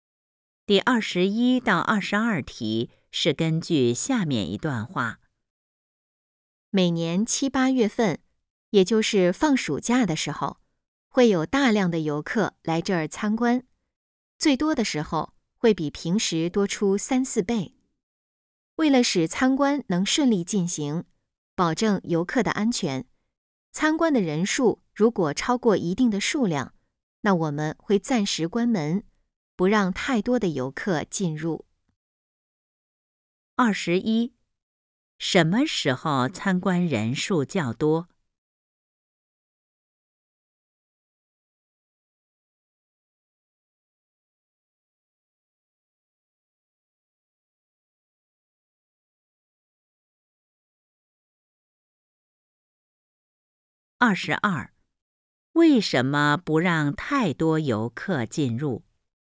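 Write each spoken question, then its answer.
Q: 什么时候参观人数较多?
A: 每年七八月份,放暑假的时候

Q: 为什么不让太多游客进入?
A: 为了保证游客的安全,让参观顺利进行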